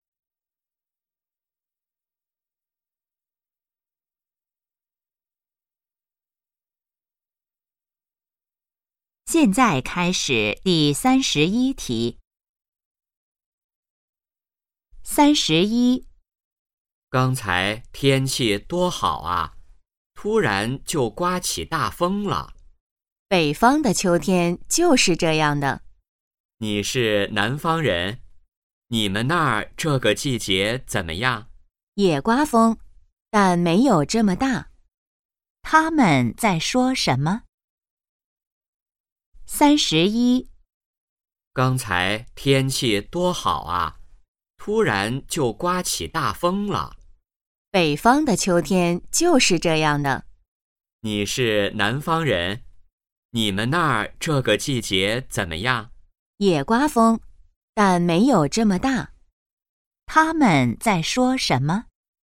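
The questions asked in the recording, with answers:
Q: 他们在说什么?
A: 天气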